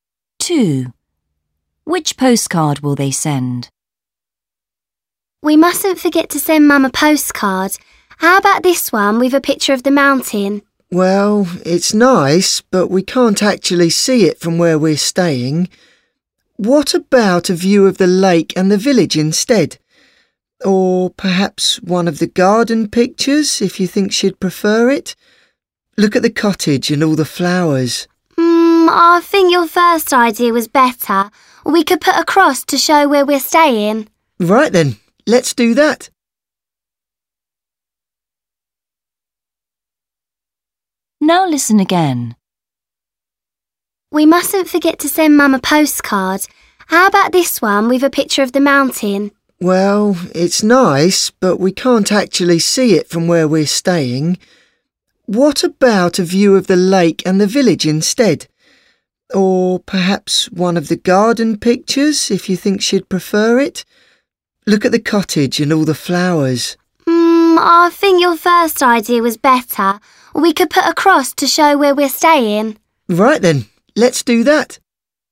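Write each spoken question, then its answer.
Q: Which postcard will they send?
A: the one with the mountain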